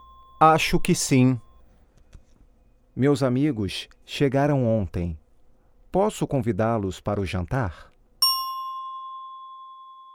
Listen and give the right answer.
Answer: Acho que sim.